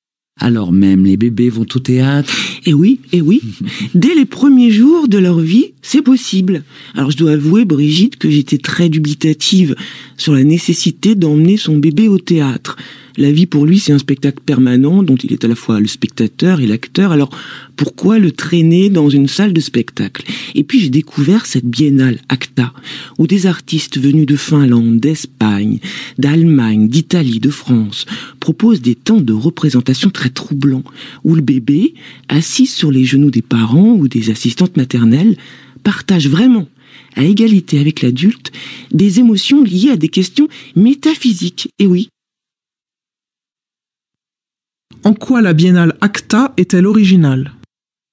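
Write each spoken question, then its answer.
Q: En quoi la biennale ACTA est-elle originale ?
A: Des artistes de plusieurs pays proposent des spectacles où le bébé, sur les genoux des adultes, partage à égalité avec eux des émotions liées à des questions métaphysiques.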